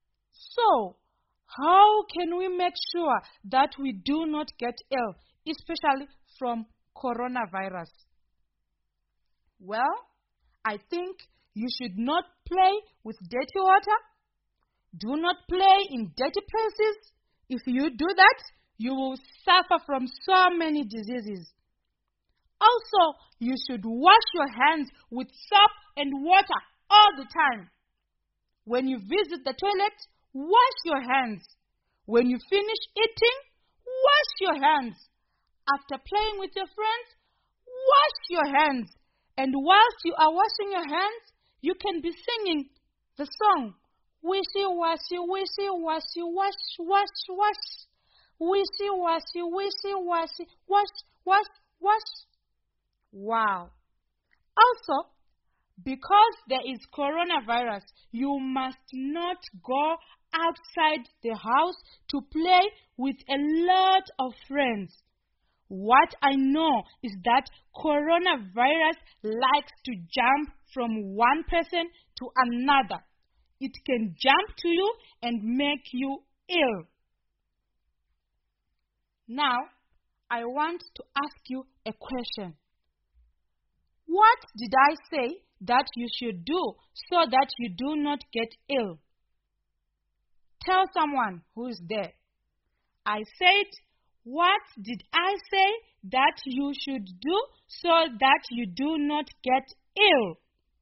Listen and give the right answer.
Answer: Alright, I said you should not play with dirty things.